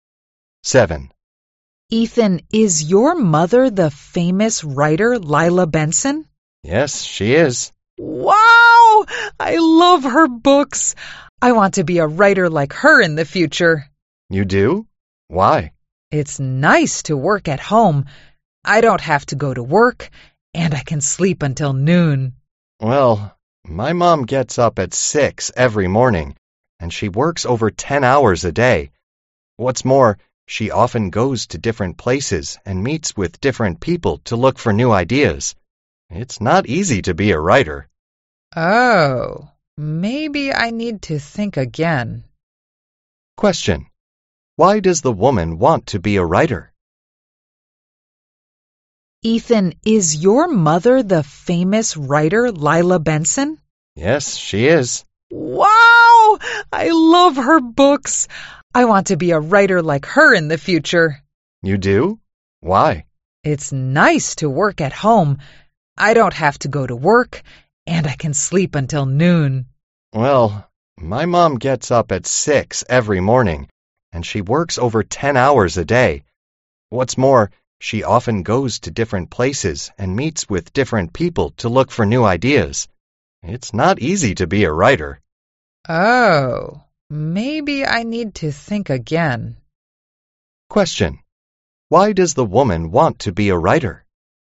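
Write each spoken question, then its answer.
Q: Question. Why does the woman want to be a writer?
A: She thinks she can work at home and sleep until noon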